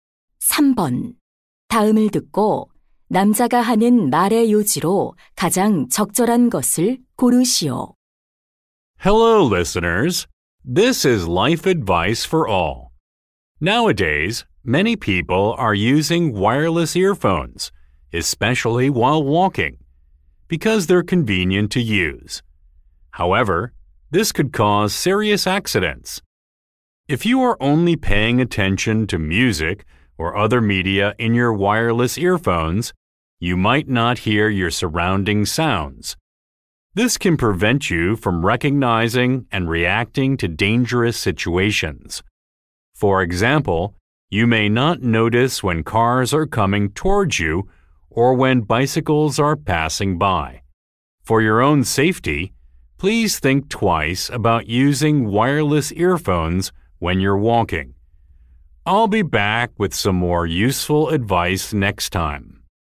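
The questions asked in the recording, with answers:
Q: 다음을 듣고 남자가 하는 말의 요지로 가장 적절한 것을 고르시오.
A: 걸을 때 무선 이어폰 사용은 사고를 유발할 수 있어 위험하다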